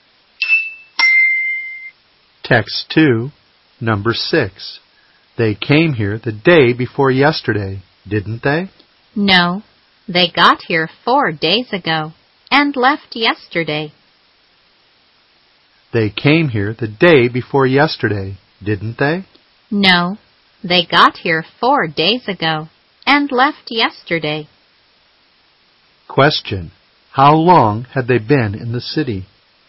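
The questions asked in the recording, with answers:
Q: how long had they been in the city?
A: About three days (they arrived 4 days ago and left yesterday)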